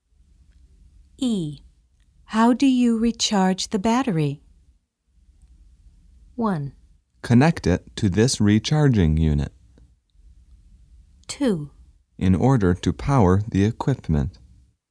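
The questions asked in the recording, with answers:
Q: How do you recharge the battery?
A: 1: Connect it to this recharging unit.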